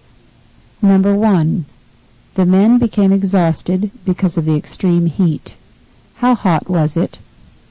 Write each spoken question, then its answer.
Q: How hot was it?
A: Number 1 is A, very hot.